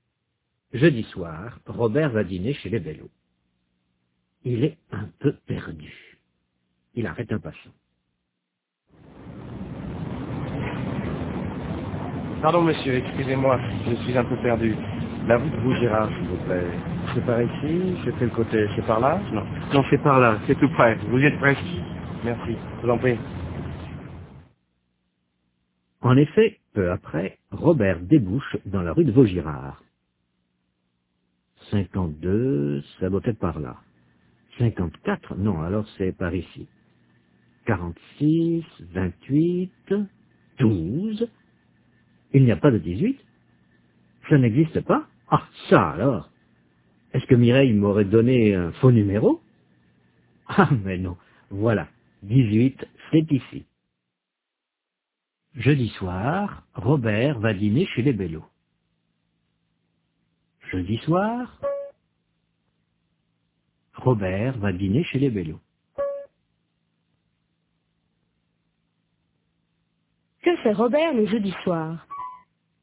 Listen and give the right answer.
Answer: Il va dîner chez les Bellot.